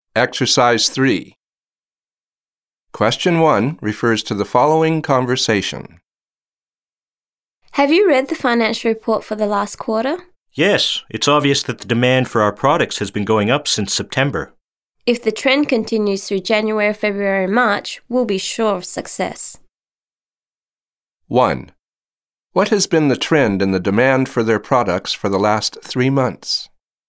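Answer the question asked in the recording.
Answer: It has been going up (increasing).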